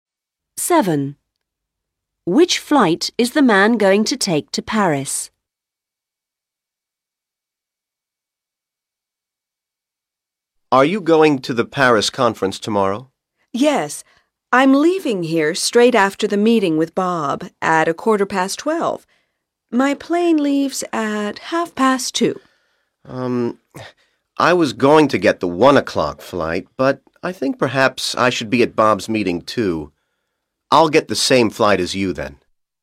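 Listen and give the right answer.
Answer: The 2:30 flight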